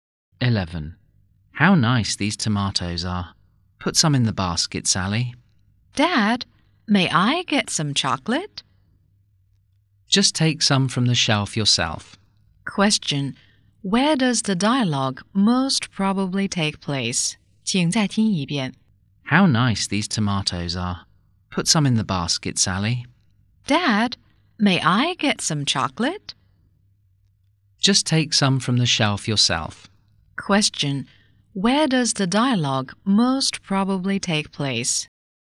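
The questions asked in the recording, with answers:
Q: Where does the dialogue most probably take place?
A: In a supermarket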